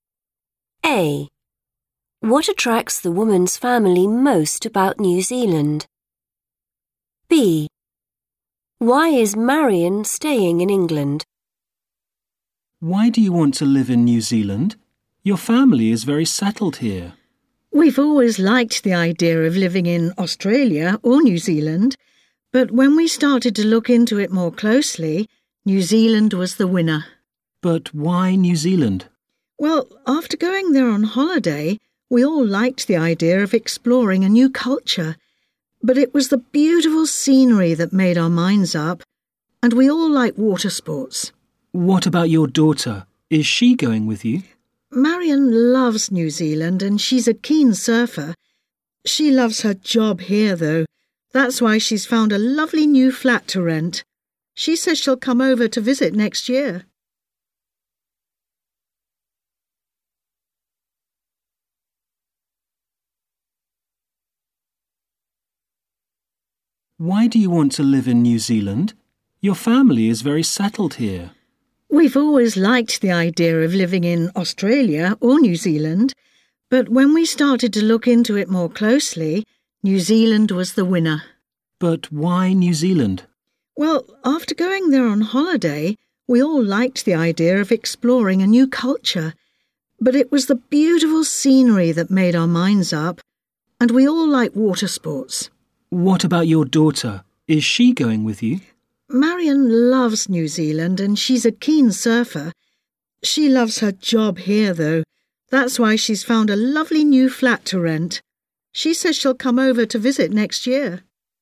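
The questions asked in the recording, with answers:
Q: What attracts the woman's family most about New Zealand?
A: the beautiful scenery

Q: Why is Marion staying in England?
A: she loves her job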